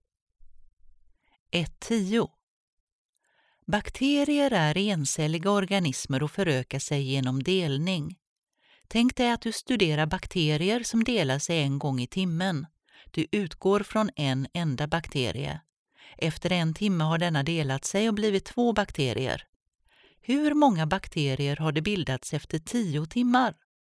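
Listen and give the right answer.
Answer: 1024 bakterier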